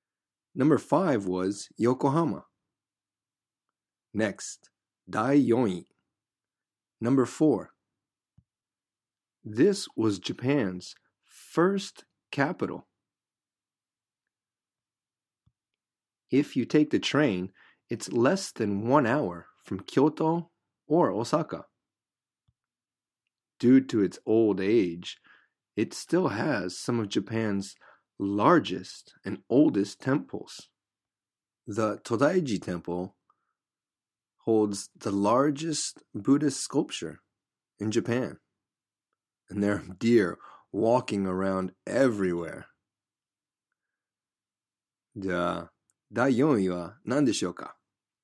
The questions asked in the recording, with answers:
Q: じゃあ、第4位は何でしょうか?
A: That's right. Nara.